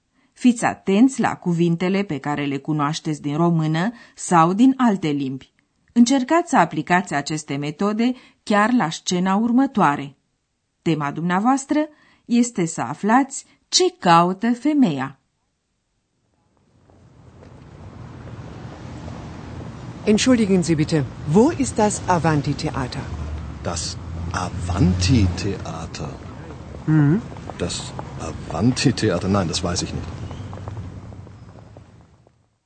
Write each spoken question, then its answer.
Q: Tema dumneavoastră este să aflați ce caută femeia.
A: Ați înțeles că femeia caută un anumit teatru.